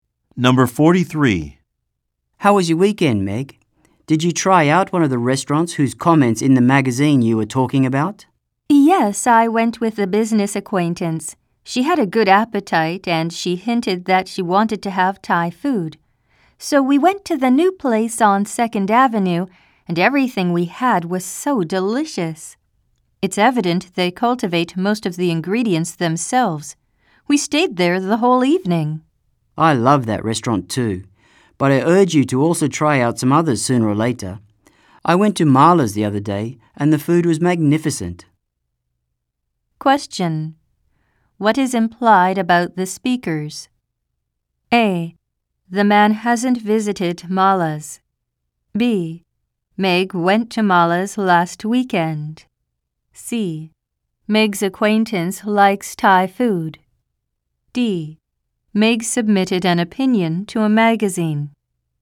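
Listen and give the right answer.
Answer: C: Meg's acquaintance likes Thai food.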